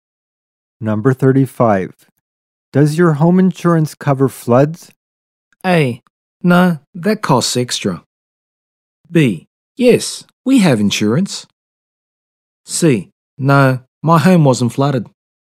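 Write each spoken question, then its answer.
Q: Does your home insurance cover floods?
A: A: No, that costs extra.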